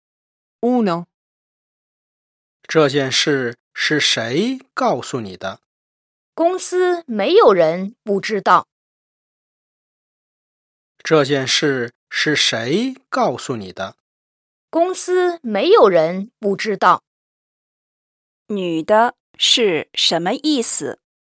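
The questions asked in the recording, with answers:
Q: 女的是什么意思?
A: 公司里每个人都知道这件事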